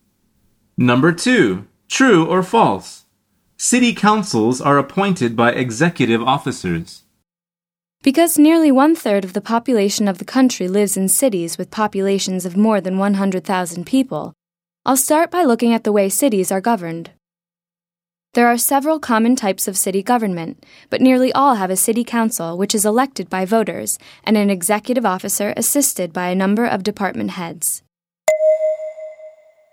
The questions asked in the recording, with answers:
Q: True or false? City councils are appointed by executive officers.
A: The answer is false.